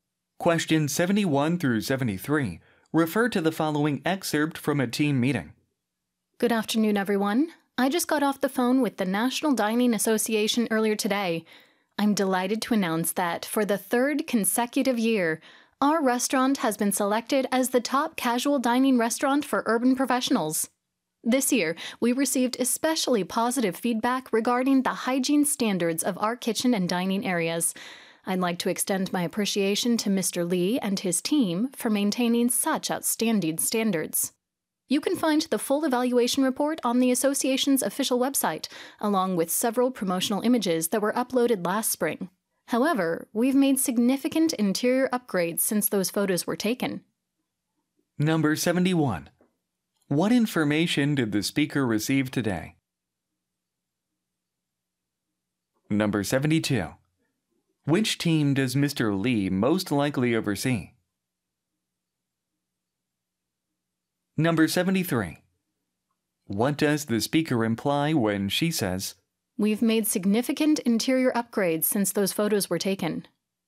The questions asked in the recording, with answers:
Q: What information did the speaker receive today?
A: D번. The restaurant received an award.

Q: Which team does Mr. Lee most likely oversee?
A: B번 The Sanitation Team